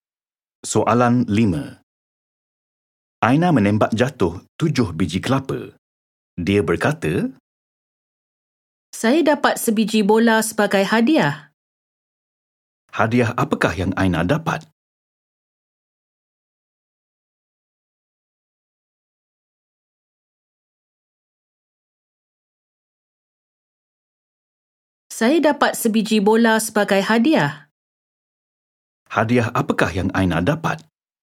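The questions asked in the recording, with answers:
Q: Hadiah apakah yang Aina dapat?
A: Sebiji bola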